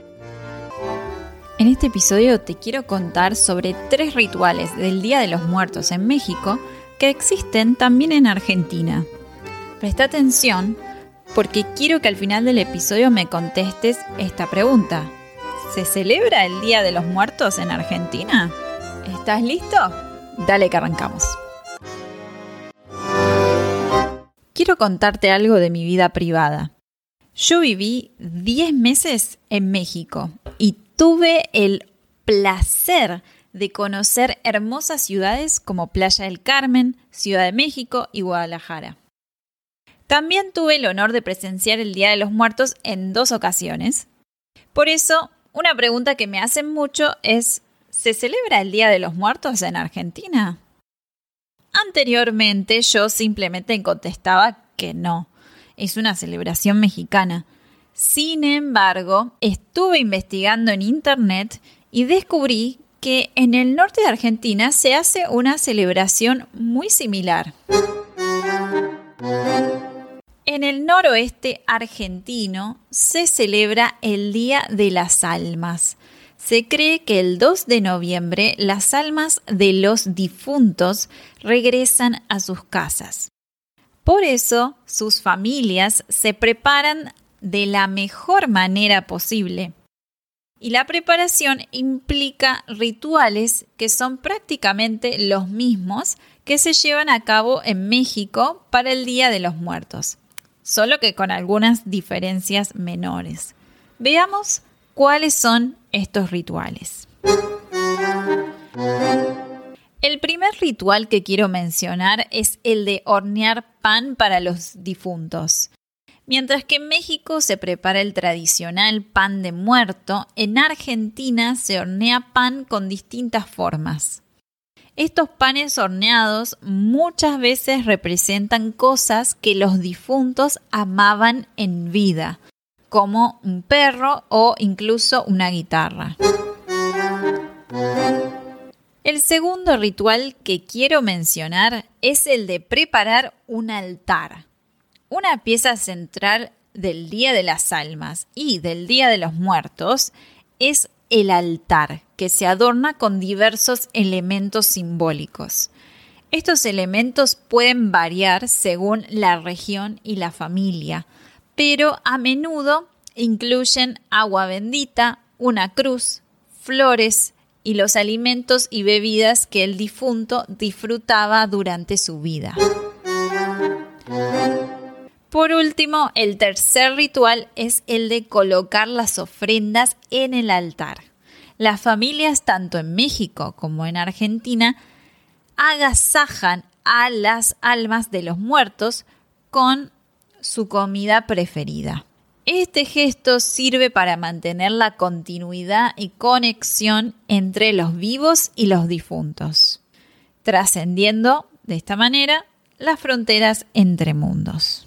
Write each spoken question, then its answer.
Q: ¿Se celebra el Día de los Muertos en Argentina?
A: ya sabéis que el Día de los Muertos no se celebra en Argentina.